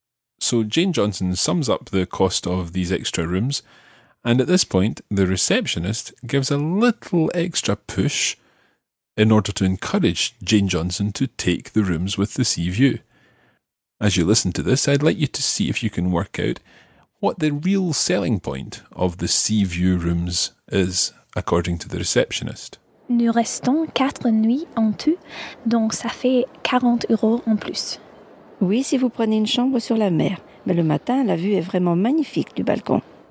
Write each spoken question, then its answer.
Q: I'd like you to see if you can work out what the real selling point of the sea view rooms is, according to the receptionist.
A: So the view is truly magnificent from the balcony.